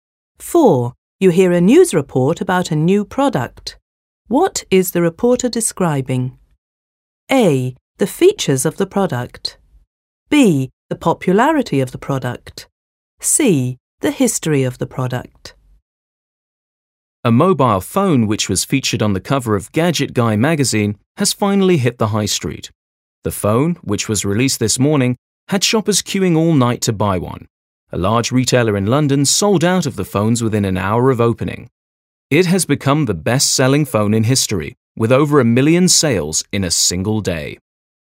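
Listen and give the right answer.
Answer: B: The popularity of the product.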